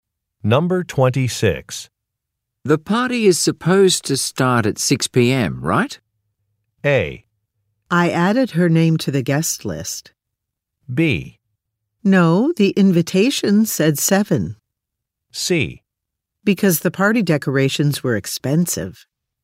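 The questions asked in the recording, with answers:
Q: The party is supposed to start at 6 p.m., right?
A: B: No, the invitation said 7.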